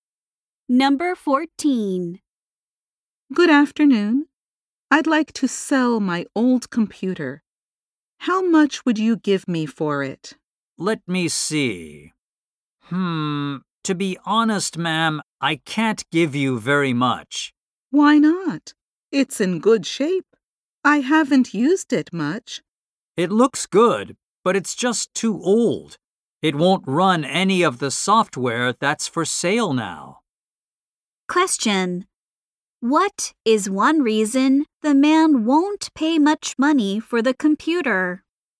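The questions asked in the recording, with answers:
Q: What is one reason the man won't pay much money for the computer?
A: It is too old to run current software.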